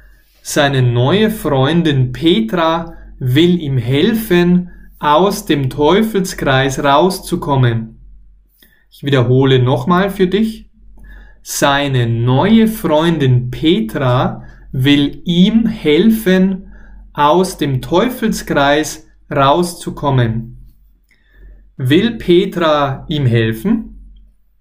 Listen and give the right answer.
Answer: Jap, ja, ja, sie will ihm helfen.